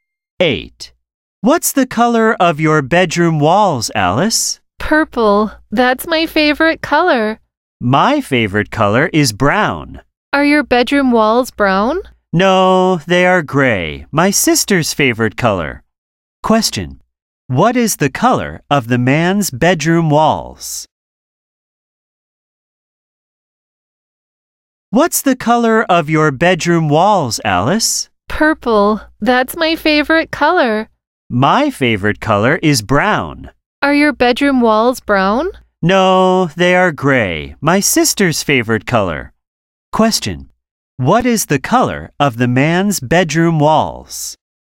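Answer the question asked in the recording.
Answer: Gray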